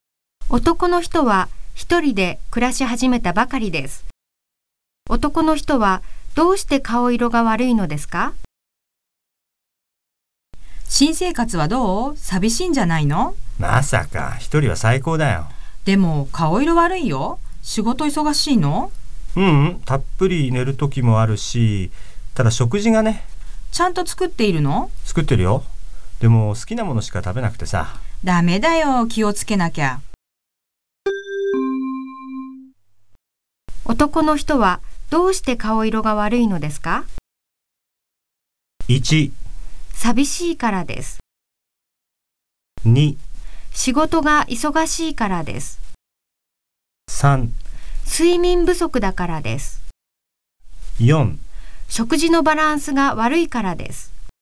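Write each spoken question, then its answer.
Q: 男の人はどうして顔色が悪いのですか?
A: 4: 食事のバランスが悪いからです。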